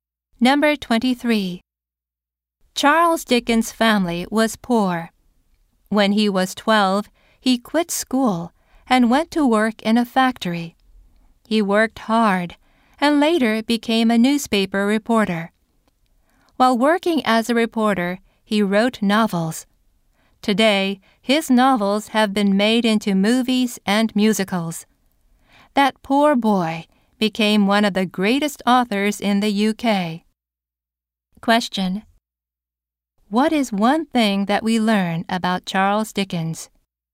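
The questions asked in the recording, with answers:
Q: What is one thing that we learn about Charles Dickens?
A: He quit school at 12 to work in a factory and later became a great author.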